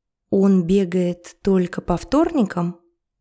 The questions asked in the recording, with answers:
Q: Он бегает только по вторникам?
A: Нет, он бегает каждый день.